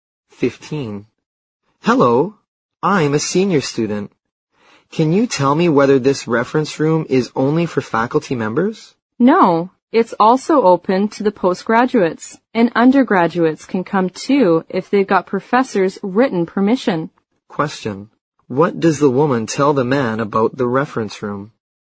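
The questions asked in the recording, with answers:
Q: What does the woman tell the man about the reference room?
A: It's open to faculty and postgraduates; undergraduates need professors' written permission.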